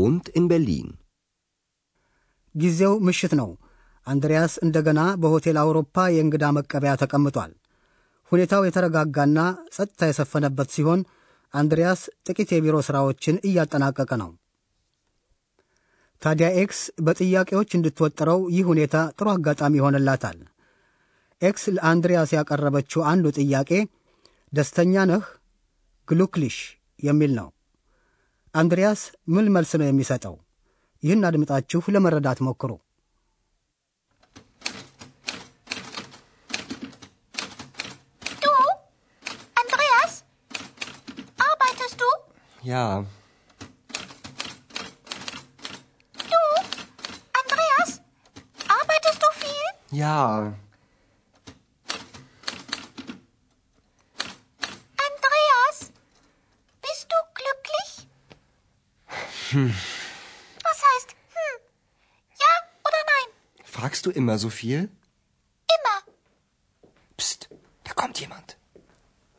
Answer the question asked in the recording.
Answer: አንድሪያስ አዎን ይበል ወይም አይደለሁም መወሰን ስላቃተው ህም ብቻ ይላል።